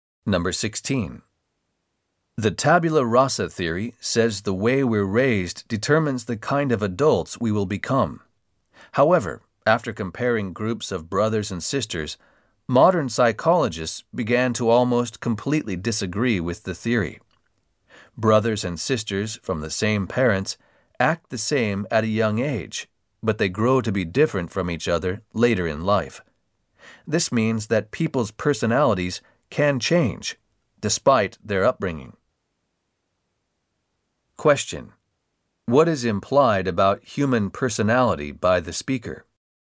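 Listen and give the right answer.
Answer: Personality is not determined only by upbringing; it can change as people grow up.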